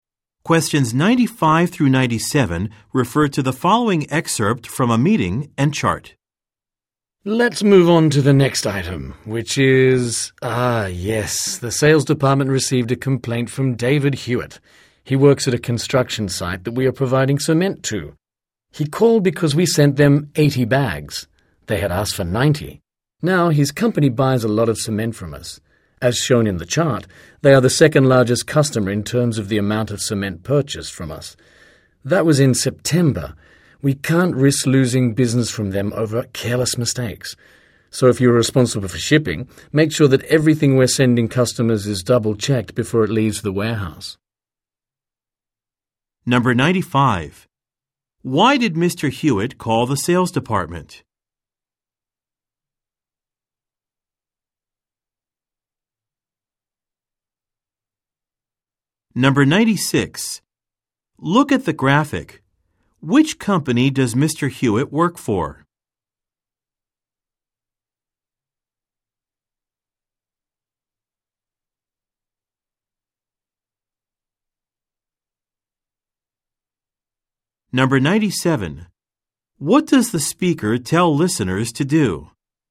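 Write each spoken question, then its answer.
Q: Why did Mr. Hewitt call the sales department?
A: His company received fewer bags of cement than it ordered (80 instead of 90).

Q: What does the speaker tell listeners to do?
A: Double-check everything being sent to customers before it leaves the warehouse.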